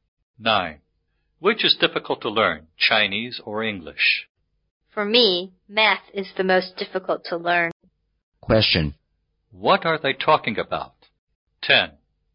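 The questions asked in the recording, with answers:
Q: What are they talking about?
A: Which subject is the most difficult to learn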